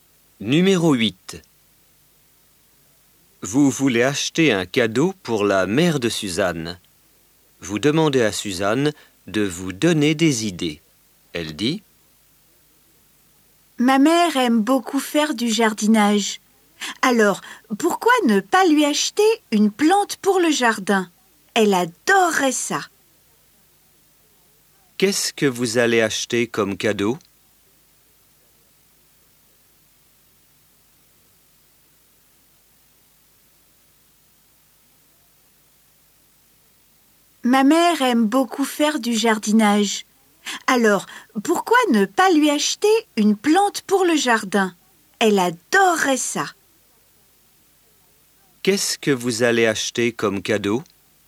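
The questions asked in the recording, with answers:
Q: Qu'est-ce que vous allez acheter comme cadeau?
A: Une plante pour le jardin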